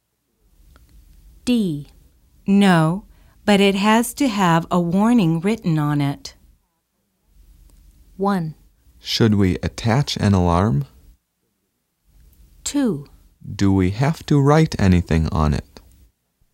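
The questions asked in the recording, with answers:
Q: No, but it has to have a warning written on it.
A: 1: Should we attach an alarm?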